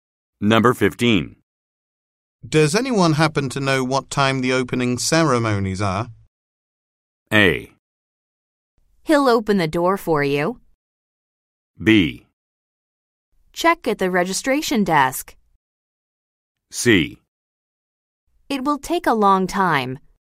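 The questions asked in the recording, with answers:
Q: Does anyone happen to know what time the opening ceremonies are?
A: B: Check at the registration desk.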